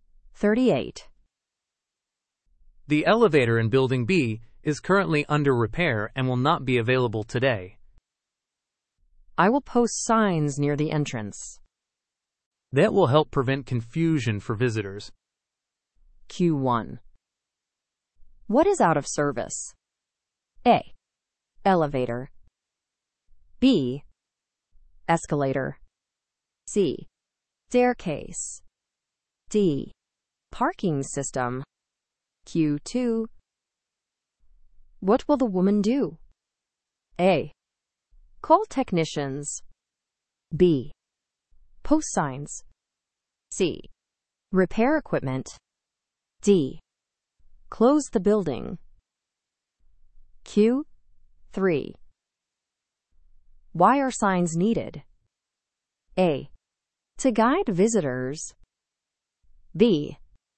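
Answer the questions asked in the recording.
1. A: Elevator.
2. B: Post signs.
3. A: To guide visitors.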